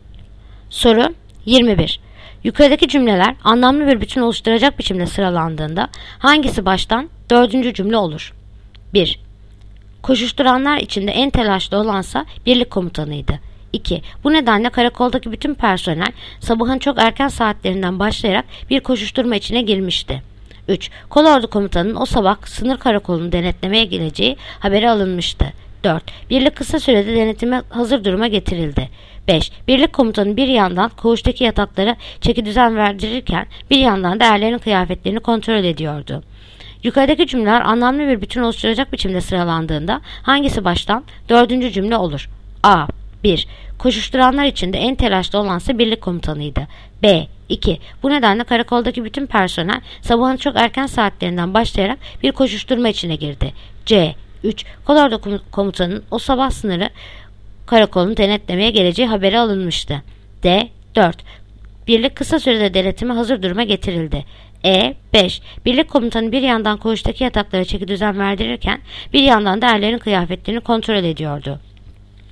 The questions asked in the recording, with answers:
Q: Yukarıdaki cümleler anlamlı bir bütün oluşturacak biçimde sıralandığında hangisi baştan dördüncü cümle olur?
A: Yanıt: Edirne. 5. Birlik komutanı bir yandan koğuştaki yataklara çeki düzen verdirirken bir yandan da erlerin kıyafetlerini kontrol ediyordu.